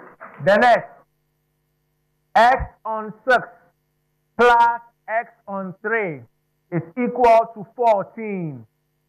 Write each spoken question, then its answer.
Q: X on 6 plus X on 3 is equal to 14.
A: X is 28.